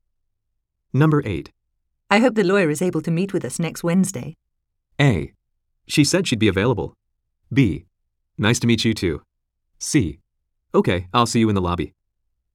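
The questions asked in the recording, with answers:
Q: I hope the lawyer is able to meet with us next Wednesday.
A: A: She said she'd be available.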